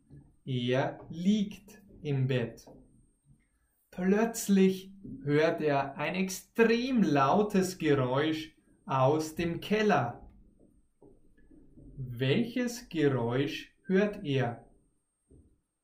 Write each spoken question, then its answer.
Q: Welches Geräusch hört er?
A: Ein lautes. Er hört ein extrem lautes Geräusch.